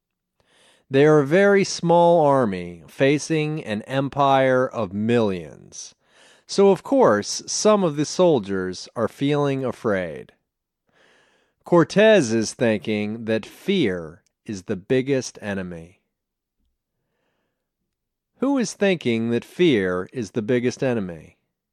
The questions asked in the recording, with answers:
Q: Who is thinking that fear is the biggest enemy?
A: Cortez is thinking that fear is the biggest enemy.